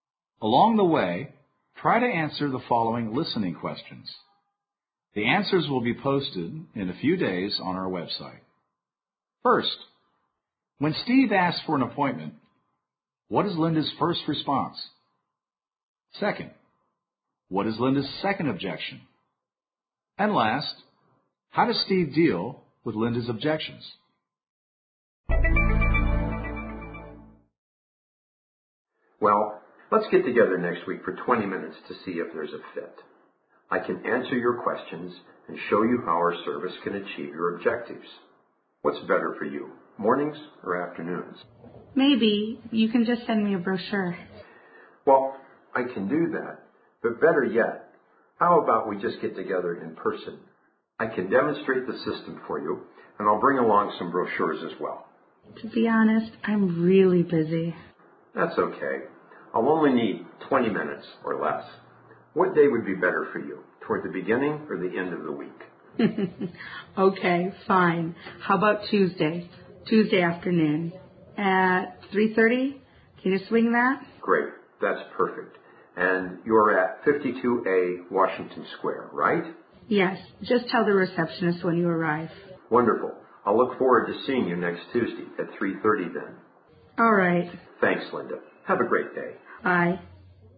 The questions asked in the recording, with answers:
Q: First, when Steve asks for an appointment, what is Linda's first response?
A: Linda's first negative response is a normal one. Maybe you can just send me a brochure.

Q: Second, what is Linda's second objection?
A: It's also typical. She doesn't have any time.

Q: And last, how does Steve deal with Linda's objections?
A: He briefly responds to each of Linda's objections, keeping the pressure on for her to agree.